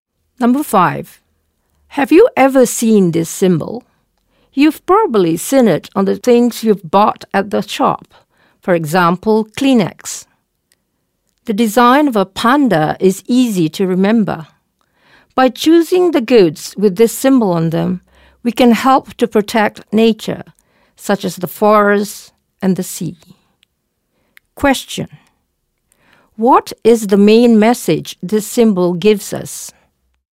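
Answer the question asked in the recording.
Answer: By choosing goods with this symbol, we can help protect nature, such as forests and the sea.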